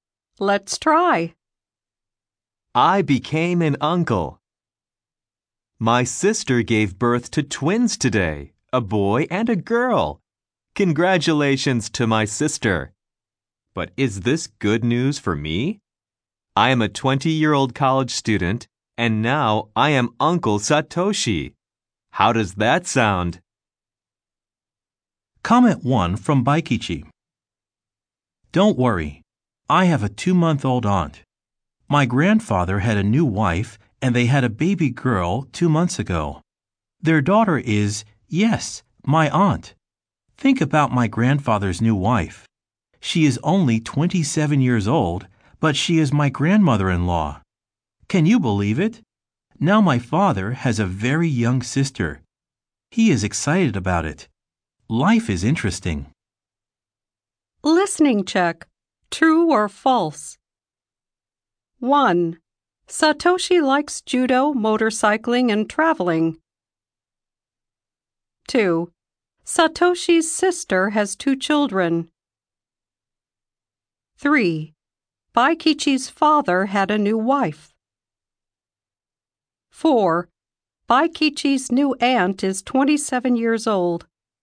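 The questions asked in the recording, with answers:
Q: Satoshi's sister has 2 children.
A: True

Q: Baikichi's father had a new wife.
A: False

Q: Baikichi's new aunt is 27 years old.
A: False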